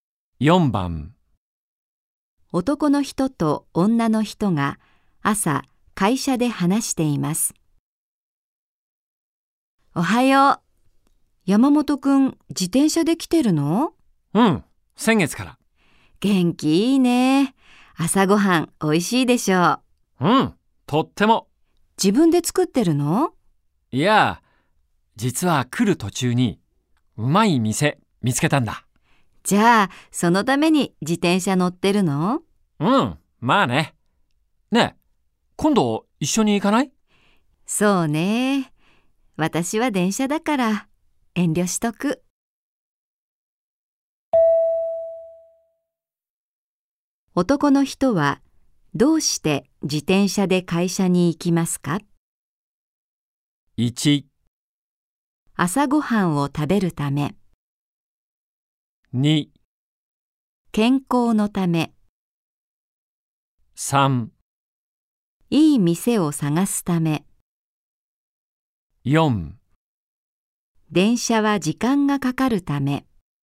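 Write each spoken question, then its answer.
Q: 男の人はどうして自転車で会社に行きますか?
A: 1: 朝ごはんを食べるため。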